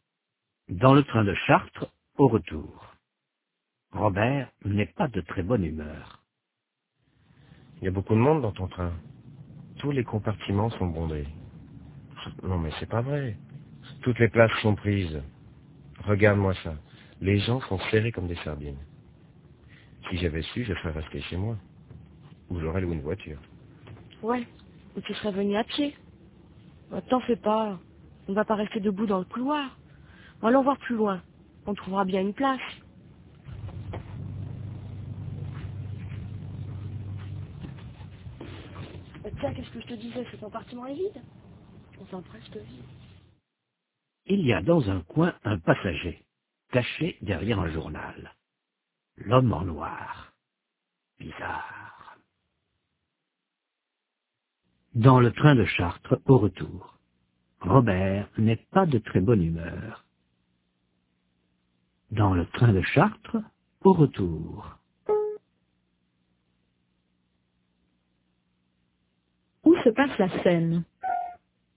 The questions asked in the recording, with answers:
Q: Où se passe la scène?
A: Dans le train de Chartres, au retour.